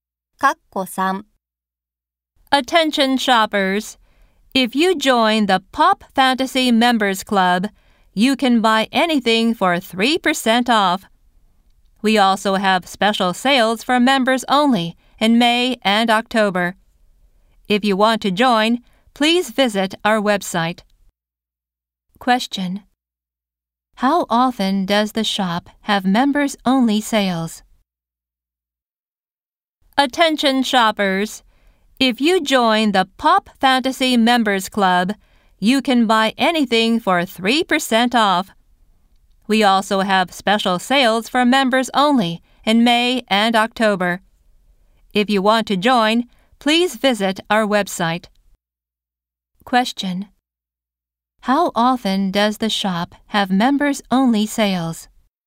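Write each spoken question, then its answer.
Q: How often does the shop have members only sales?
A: Twice a year (May and October)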